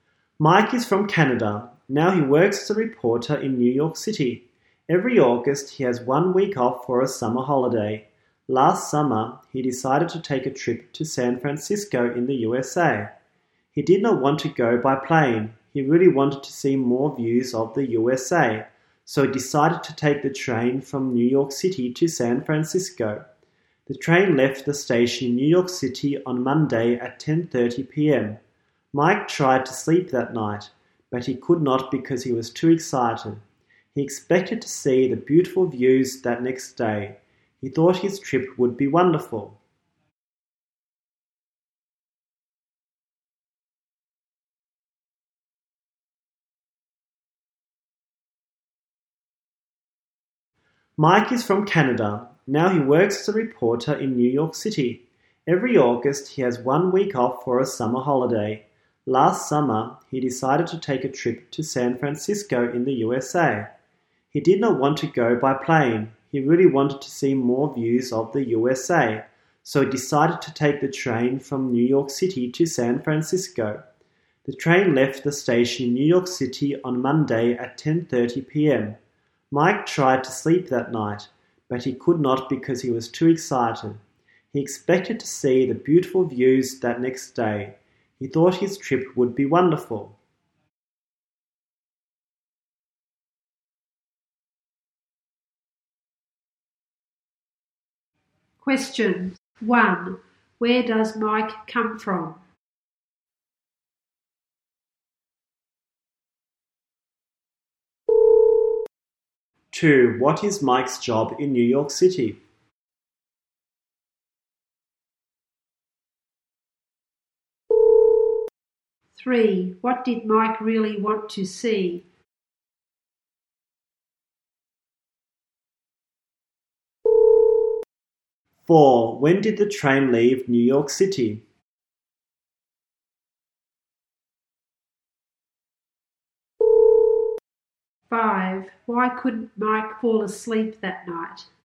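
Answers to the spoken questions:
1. Canada
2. A reporter
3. More views of the USA
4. On Monday at 10:30 p.m.
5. Because he was too excited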